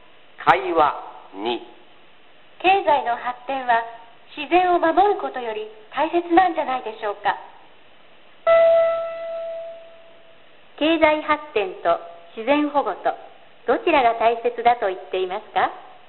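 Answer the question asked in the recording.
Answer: 経済発展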